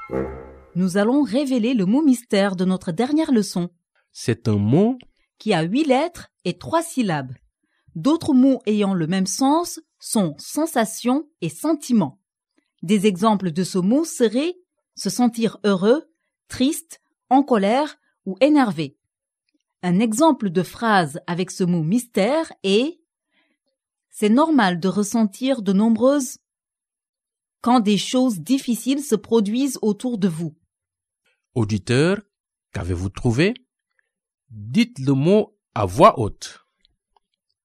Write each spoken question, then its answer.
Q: Auditeur, qu'avez-vous trouvé?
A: Le mot mystère d'aujourd'hui est émotion.